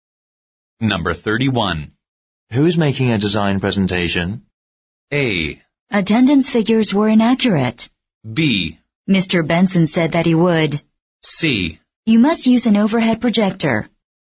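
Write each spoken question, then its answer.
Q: Who is making a design presentation?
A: B: Mr. Benson said that he would.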